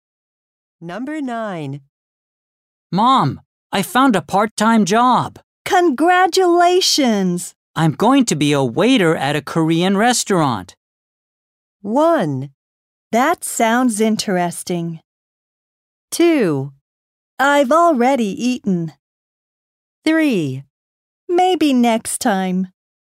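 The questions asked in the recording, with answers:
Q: I'm going to be a waiter at a Korean restaurant.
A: 1: That sounds interesting.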